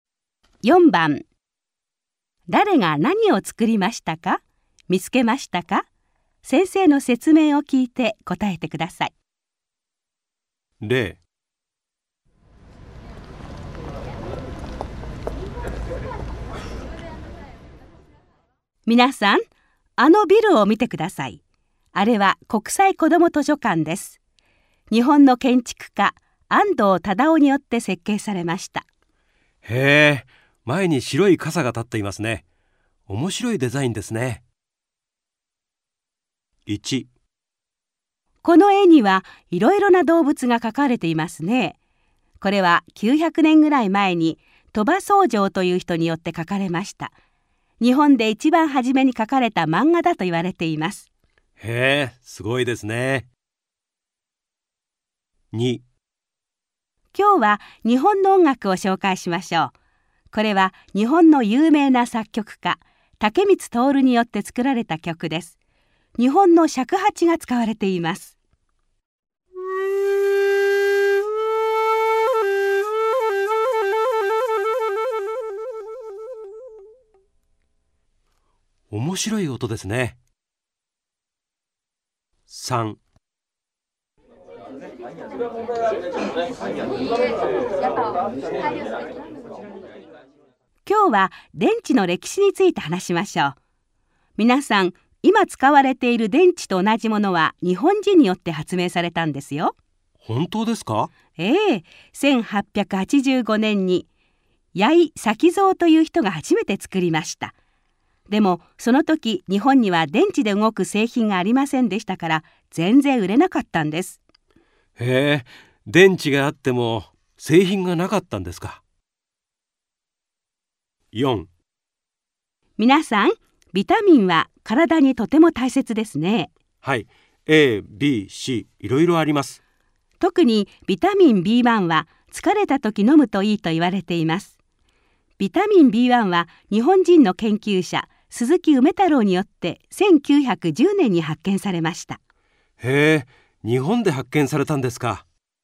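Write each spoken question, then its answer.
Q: 誰が何を作りましたか?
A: 鳥羽僧正が動物の絵(日本で一番初めの漫画)を描きました

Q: 誰が何を作りましたか?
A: 竹光徹が尺八を使った曲を作りました

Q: 誰が何を作りましたか?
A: 八井咲蔵が電池を発明しました

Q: 誰が何を作りましたか?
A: 鈴木梅太郎がビタミンB1を発見しました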